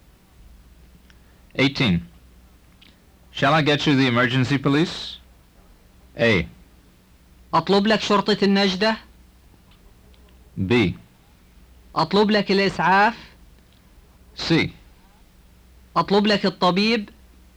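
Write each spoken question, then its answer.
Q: Shall I get you the emergency police?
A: A: أطلب لك شرطة النجدة؟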